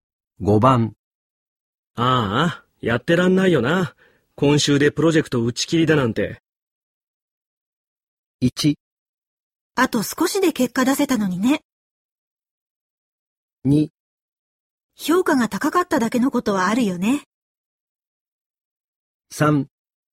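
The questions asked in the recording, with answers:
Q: ああ、やってらんないよな。今週でプロジェクト打ち切りだなんて。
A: 1: あと少しで結果出せたのにね。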